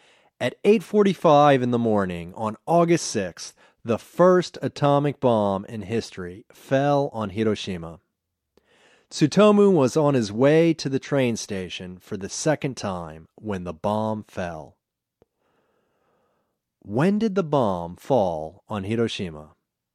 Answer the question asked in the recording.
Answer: The bomb fell on Hiroshima at 8:45 in the morning on August 6th.